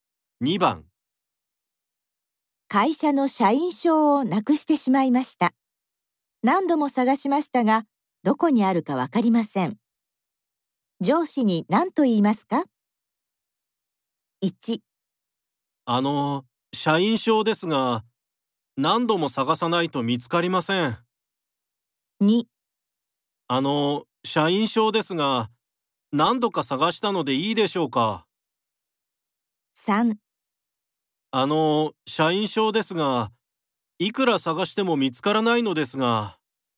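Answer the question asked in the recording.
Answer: 3: あの、社員証ですが、いくら探しても見つからないのですが。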